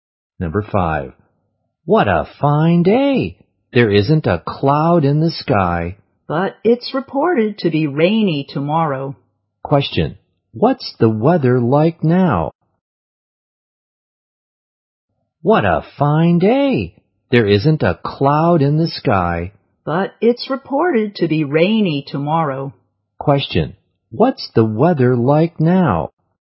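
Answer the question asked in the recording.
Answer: Fine/sunny, no clouds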